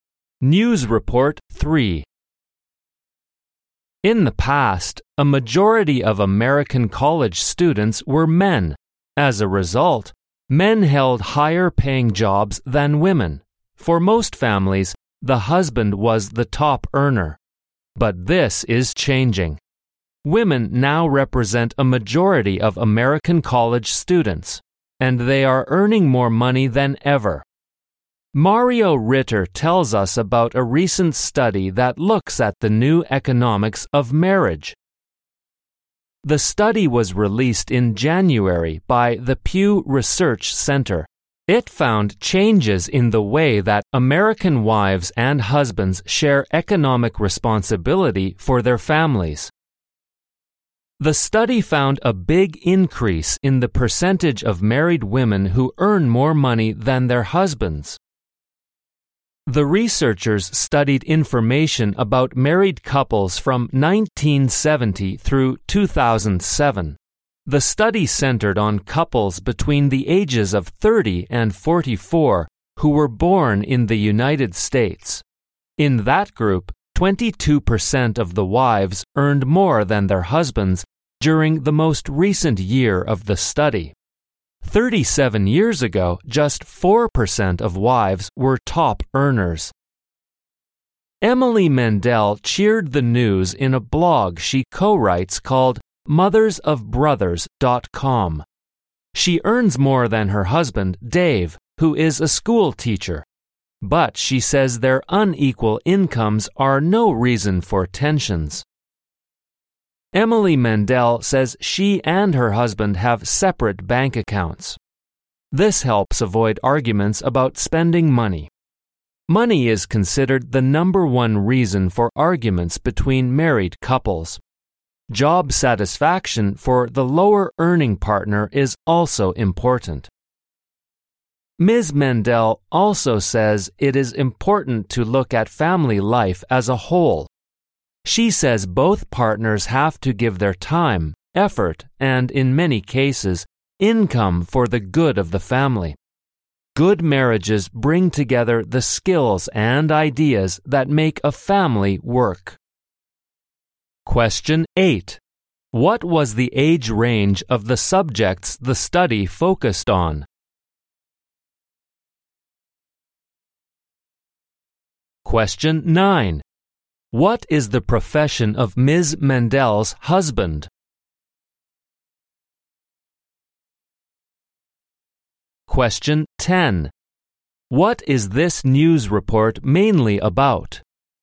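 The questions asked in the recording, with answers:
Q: What was the age range of the subjects the study focused on?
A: Between 30 and 44

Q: What is the profession of Ms. Mendel's husband?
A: A school teacher

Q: What is this news report mainly about?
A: The new economics of marriage: more American wives now earn more than their husbands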